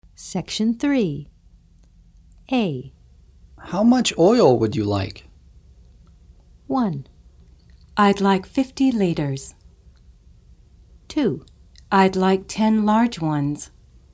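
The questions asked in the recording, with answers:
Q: How much oil would you like?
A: 1: I'd like 50 liters.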